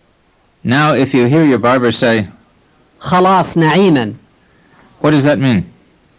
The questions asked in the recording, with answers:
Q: What does that mean?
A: It means I have finished. I wish you God's grace.